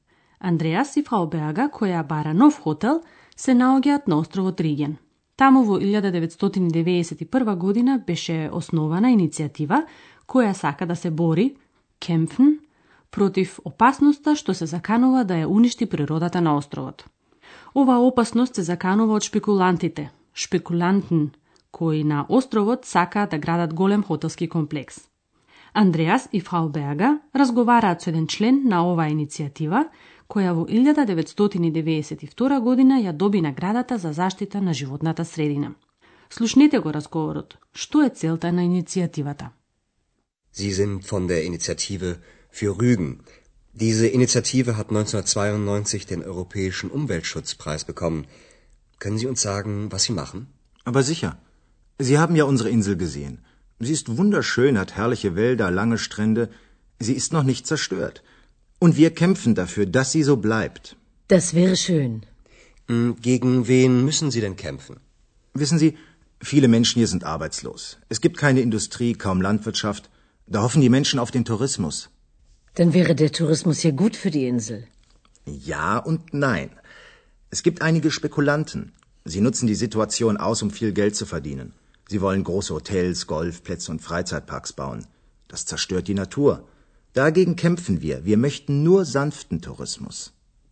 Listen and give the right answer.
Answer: Целта на иницијативата е умерениот туризам, а не масовниот кој би ја уништил природата.